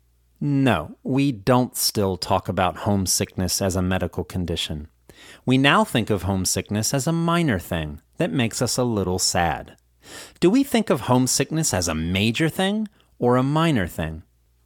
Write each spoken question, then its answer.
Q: Do we think of homesickness as a major thing or a minor thing?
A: We think of homesickness as a minor thing.